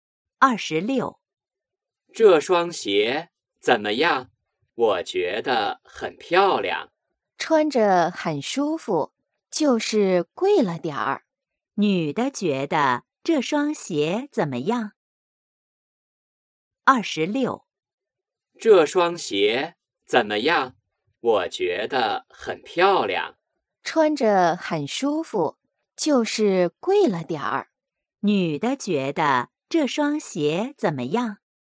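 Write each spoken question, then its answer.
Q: 女的觉得这双鞋怎么样?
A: 很舒服,但有点贵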